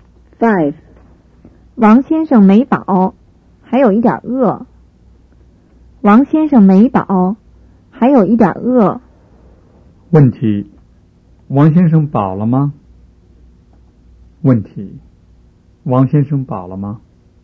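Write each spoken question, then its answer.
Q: 王先生饱了吗?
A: 没饱,还有一点饿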